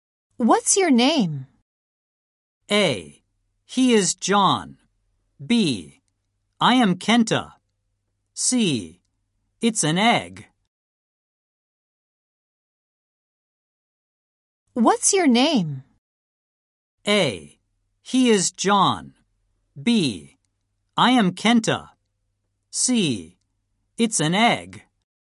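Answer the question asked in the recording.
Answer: B: I am Kenta.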